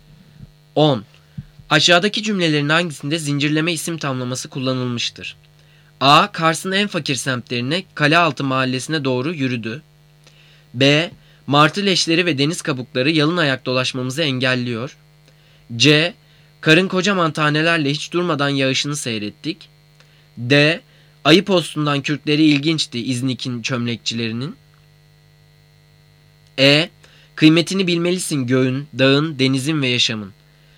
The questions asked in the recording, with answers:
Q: Aşağıdaki cümlelerin hangisinde zincirleme isim tamlaması kullanılmıştır?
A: Cevap D. Ayı postundan kürkleri ilginçti İznik'in çömlekçilerinin.